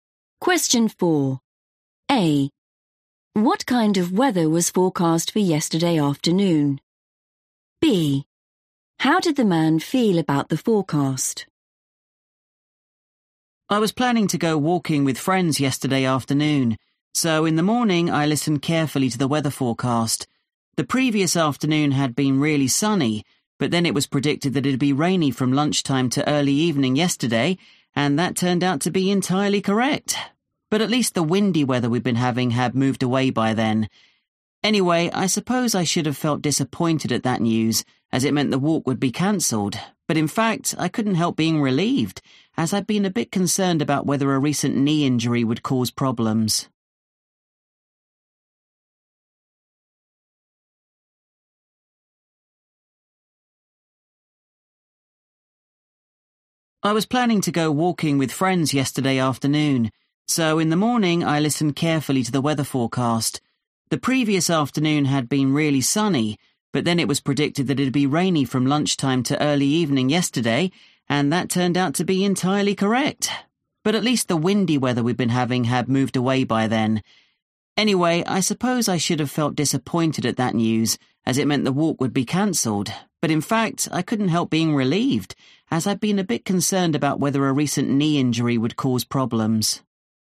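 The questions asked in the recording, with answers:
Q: What kind of weather was forecast for yesterday afternoon?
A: rainy

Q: How did the man feel about the forecast?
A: relieved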